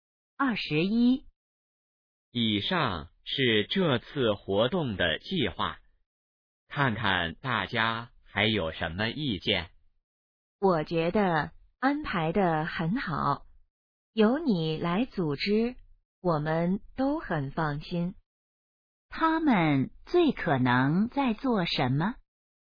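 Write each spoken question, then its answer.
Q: 他们最可能在做什么?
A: 讨论活动计划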